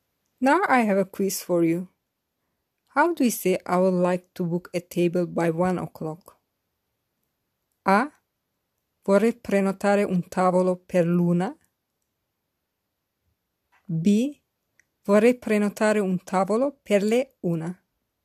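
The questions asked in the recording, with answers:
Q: How do you say I would like to book a table by 1 o'clock?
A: A: Vorrei prenotare un tavolo per l'una.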